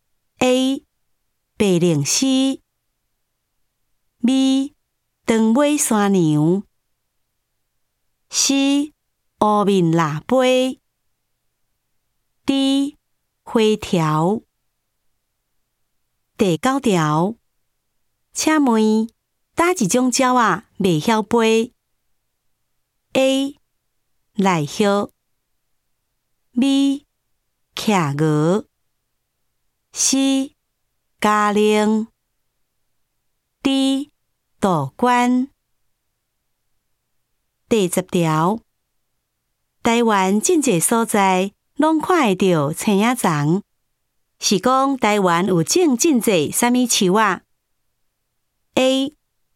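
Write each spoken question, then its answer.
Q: 请问哪一种鸟啊未晓飞 ?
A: B: 企鹅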